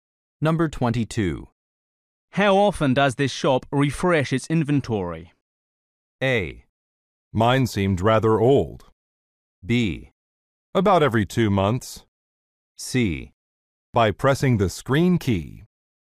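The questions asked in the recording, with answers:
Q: How often does this shop refresh its inventory?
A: B: About every 2 months.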